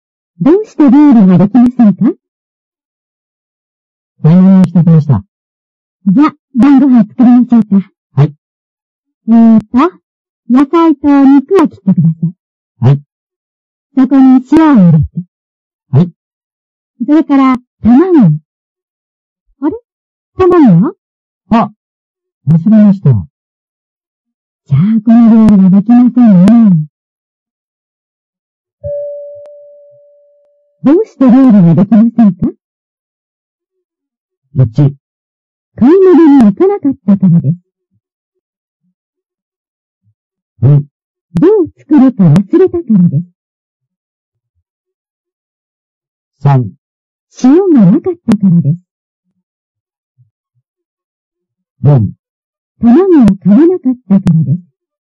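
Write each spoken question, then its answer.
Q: どうして料理ができませんか?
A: 4: 卵を買わなかったからです。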